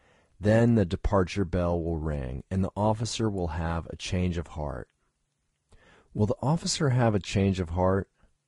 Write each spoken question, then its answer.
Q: Will the officer have a change of heart?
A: Yes, the officer will have a change of heart.